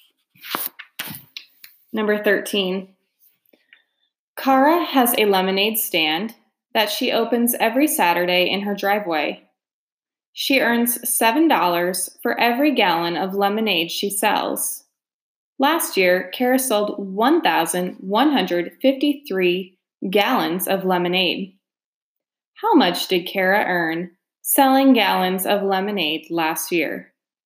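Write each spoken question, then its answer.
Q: How much did Kara earn selling gallons of lemonade last year?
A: $8,071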